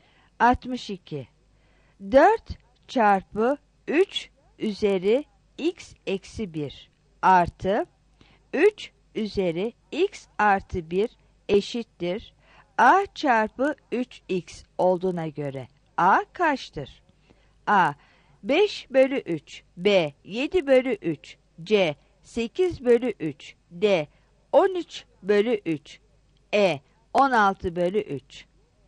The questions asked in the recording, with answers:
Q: 4 çarpı 3 üzeri x eksi 1 artı 3 üzeri x artı 1 eşittir A çarpı 3x olduğuna göre A kaçtır?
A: 62 D